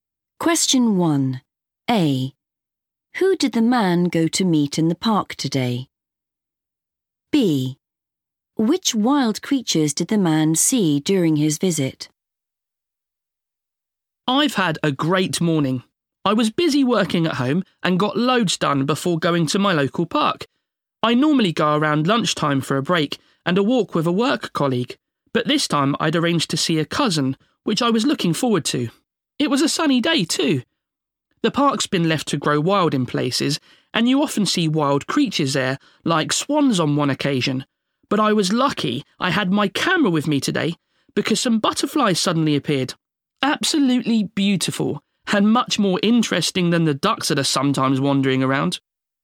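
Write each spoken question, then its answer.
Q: Who did the man go to meet in the park today?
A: a cousin

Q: Which wild creatures did the man see during his visit?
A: butterflies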